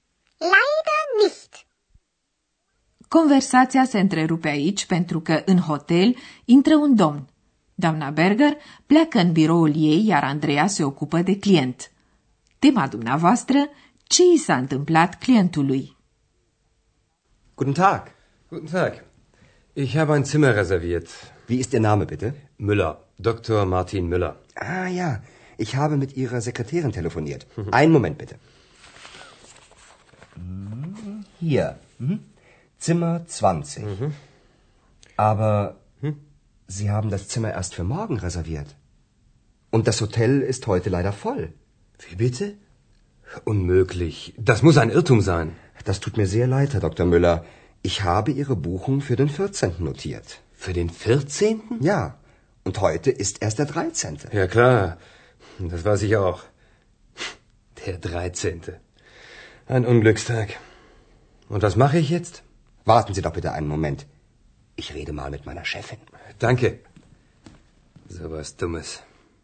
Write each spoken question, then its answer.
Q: ce i s-a întâmplat clientului?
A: Domnului Müller i s-a întâmplat ceva stupid.